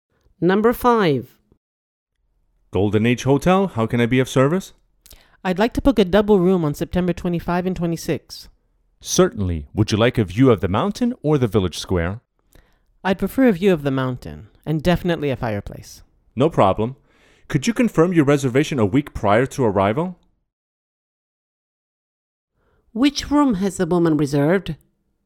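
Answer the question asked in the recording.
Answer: a double room with a mountain view and a fireplace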